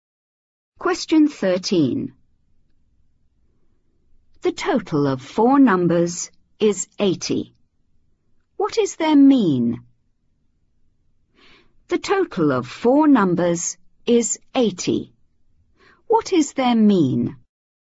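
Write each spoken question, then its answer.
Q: What is their mean?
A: 20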